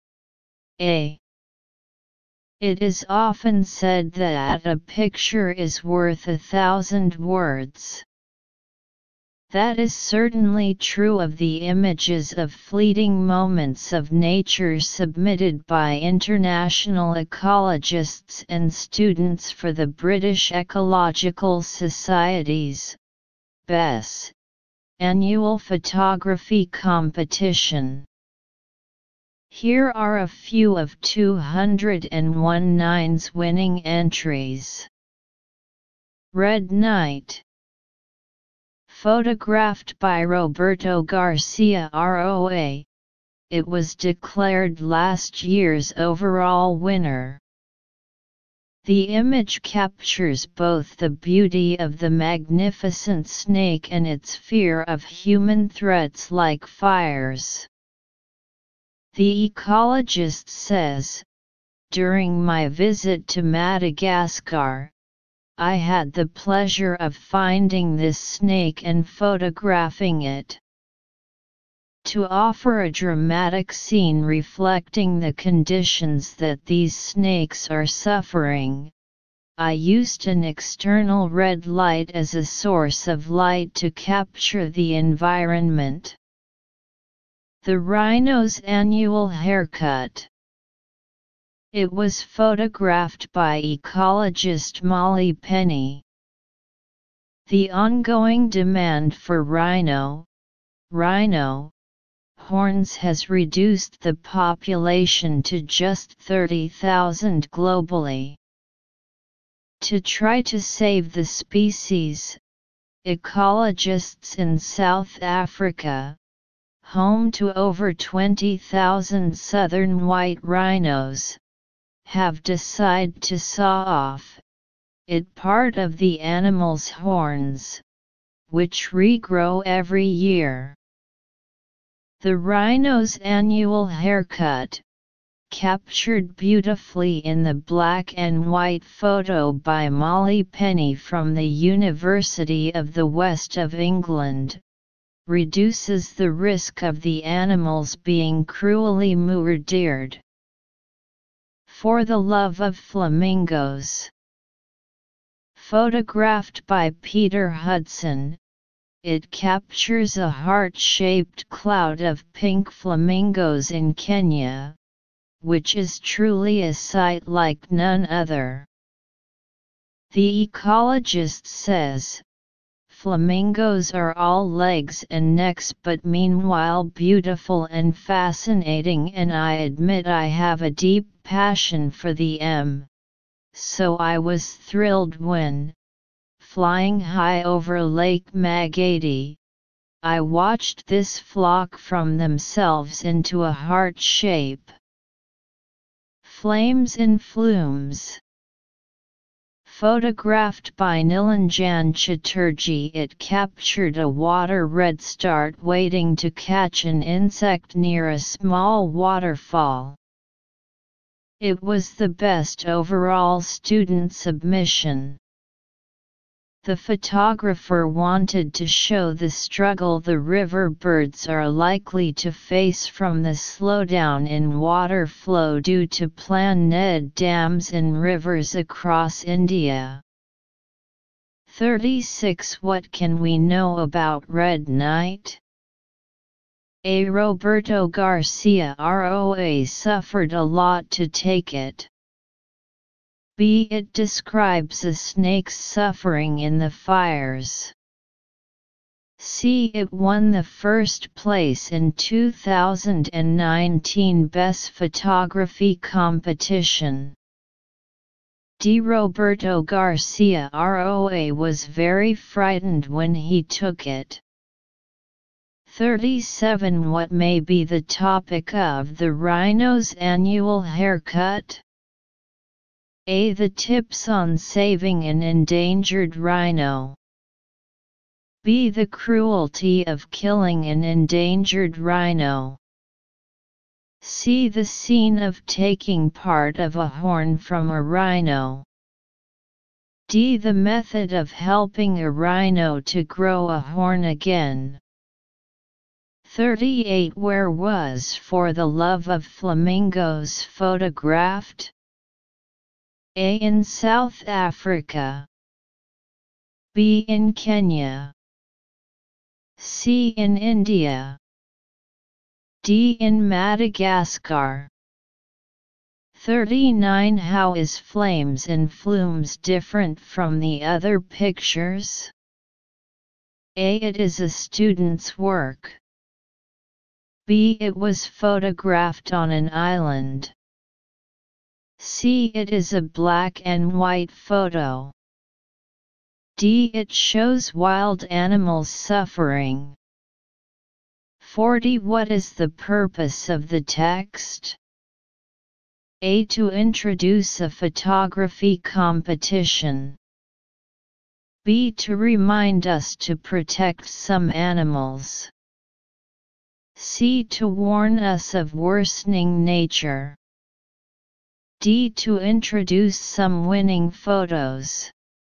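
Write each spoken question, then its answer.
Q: What can we know about red knight?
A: C: It won the first place in 2019 Best Photography Competition.

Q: What may be the topic of the rhino's annual haircut?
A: C: The scene of taking part of a horn from a rhino.

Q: Where was For the Love of Flamingos photographed?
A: B: In Kenya.

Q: How is Flames and Flumes different from the other pictures?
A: A: It is a student's work.

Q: What is the purpose of the text?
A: D: To introduce some winning photos.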